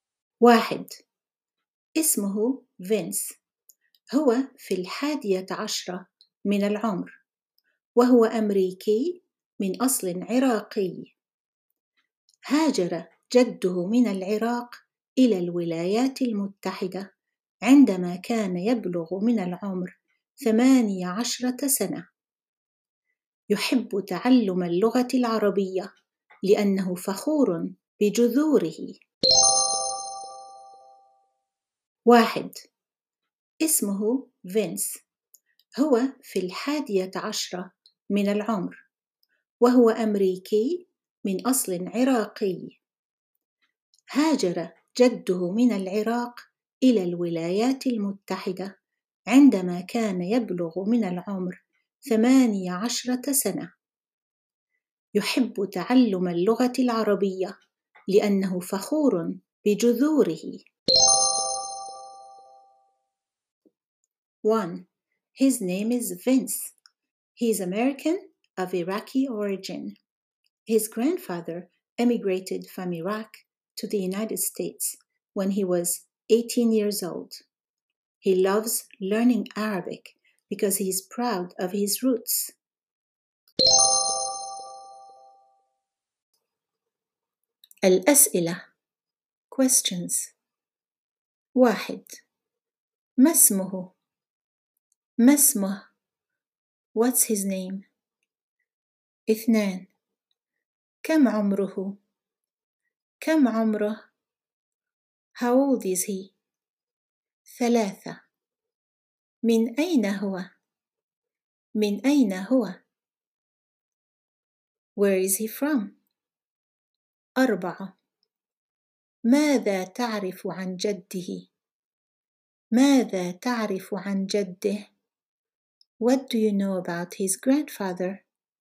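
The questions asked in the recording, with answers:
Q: ما اسمه؟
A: فينس

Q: كم عمره؟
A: في الحادية عشرة من العمر

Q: من أين هو؟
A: أمريكي من أصل عراقي

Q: ماذا تعرف عن جده؟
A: هاجر من العراق إلى الولايات المتحدة عندما كان يبلغ من العمر 18 سنة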